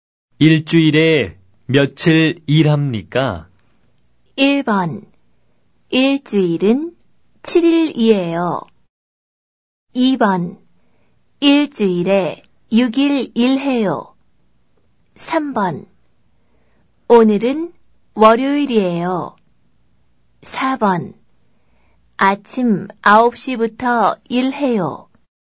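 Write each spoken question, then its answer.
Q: 일주일에 며칠 일합니까?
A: 2: 일주일에 6일 일해요.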